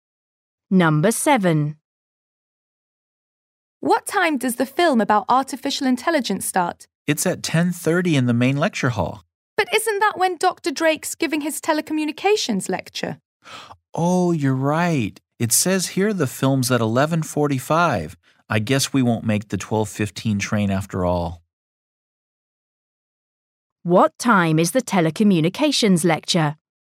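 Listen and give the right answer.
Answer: 10:30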